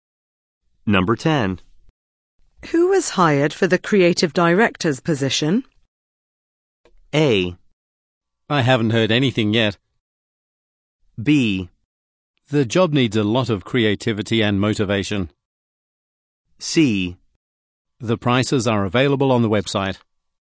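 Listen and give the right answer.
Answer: A: I haven't heard anything yet.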